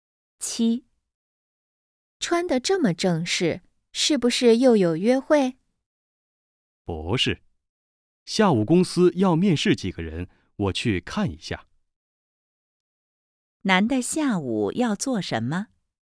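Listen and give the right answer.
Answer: 面试几个人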